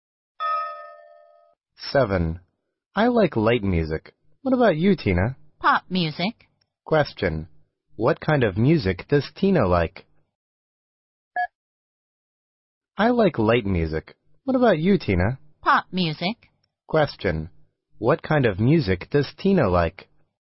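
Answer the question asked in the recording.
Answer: Pop music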